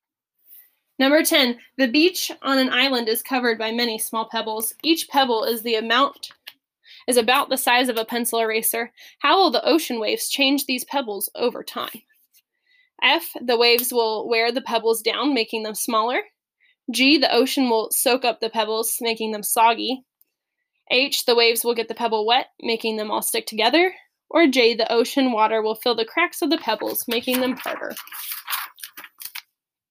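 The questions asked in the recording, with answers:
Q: How will the ocean waves change these pebbles over time?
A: F: the waves will wear the pebbles down, making them smaller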